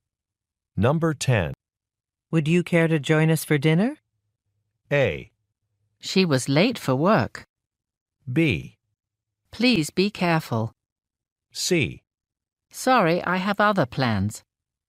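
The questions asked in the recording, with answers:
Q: Would you care to join us for dinner?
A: C: Sorry, I have other plans.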